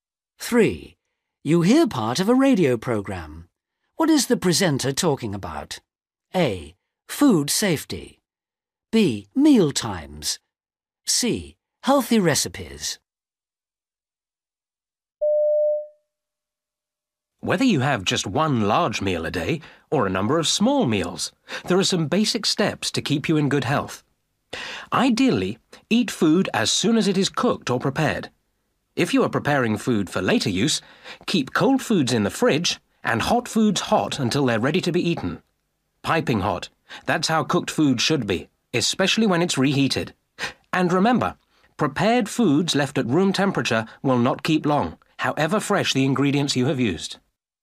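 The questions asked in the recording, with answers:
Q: What is the presenter talking about?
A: A: Food safety.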